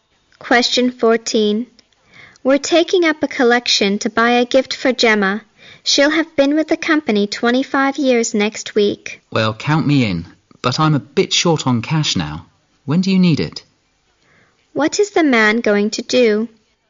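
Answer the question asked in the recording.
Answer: Contribute to Gemma's gift later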